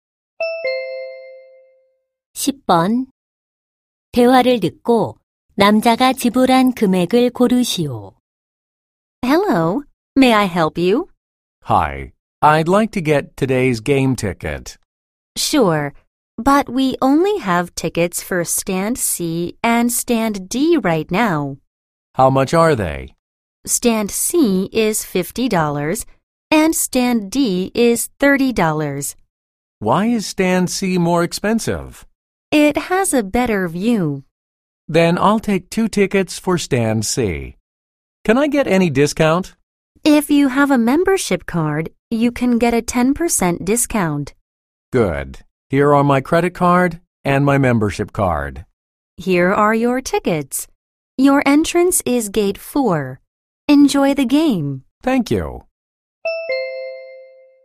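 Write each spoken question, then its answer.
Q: 대화를 듣고 남자가 지불한 금액을 고르시오.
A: 90달러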